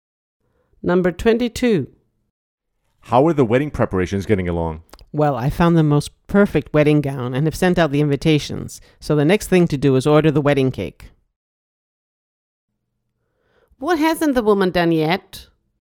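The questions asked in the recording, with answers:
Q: What hasn't the woman done yet?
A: ordered the wedding cake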